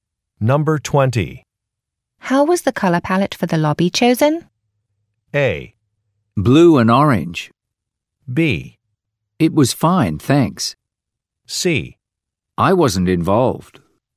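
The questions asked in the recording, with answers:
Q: How was the color palette for the lobby chosen?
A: C: I wasn't involved.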